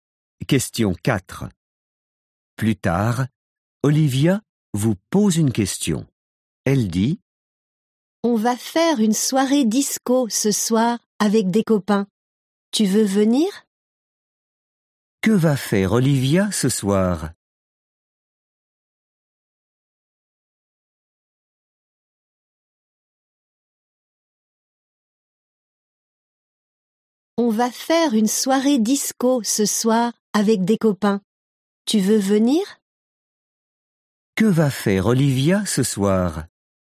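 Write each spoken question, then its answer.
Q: Que va faire Olivia ce soir ?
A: Une soirée disco avec des copains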